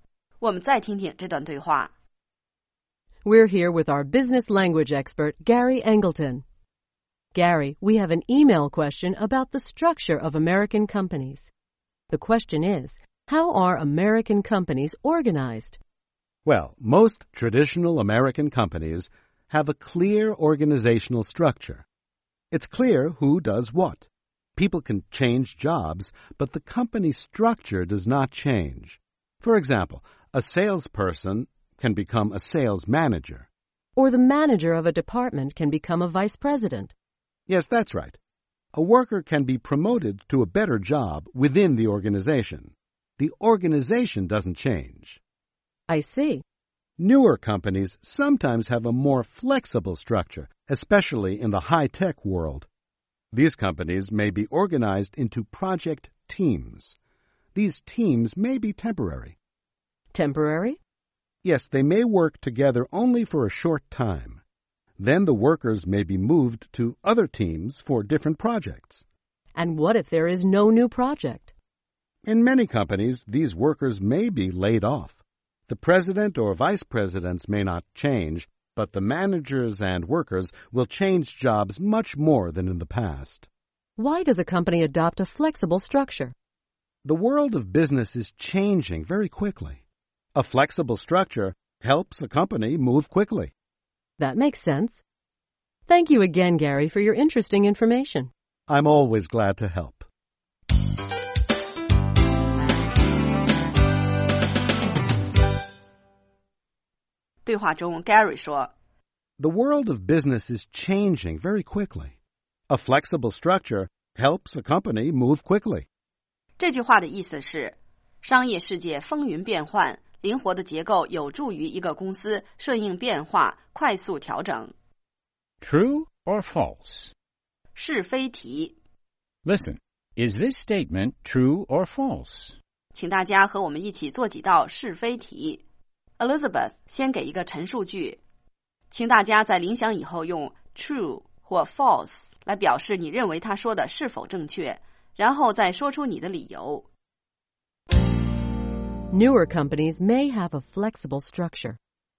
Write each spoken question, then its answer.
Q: Newer companies may have a flexible structure.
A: True. Newer companies, especially high-tech companies, often have a more flexible structure than traditional companies.